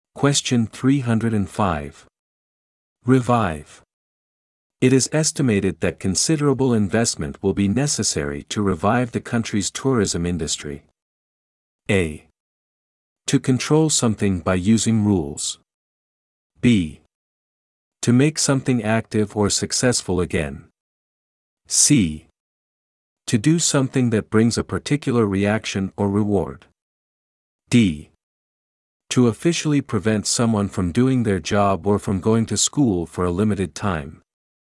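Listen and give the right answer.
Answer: B: To make something active or successful again.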